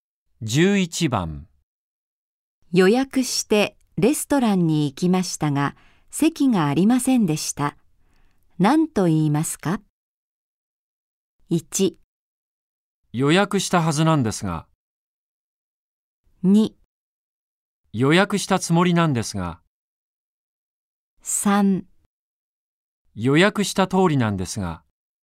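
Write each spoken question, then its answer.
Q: 何と言いますか?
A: 1: 予約したはずなんですが。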